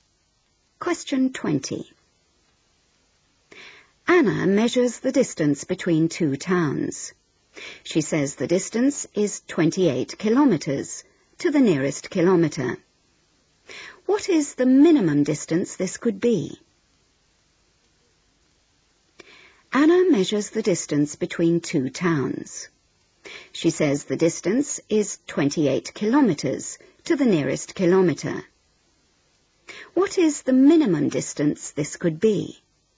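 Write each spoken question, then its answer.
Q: What is the minimum distance this could be?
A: 27.5 km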